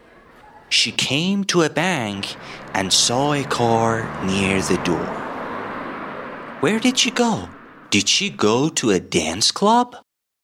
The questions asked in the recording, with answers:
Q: Did she go to a dance club?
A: No, she went to a bank and saw a car near the door.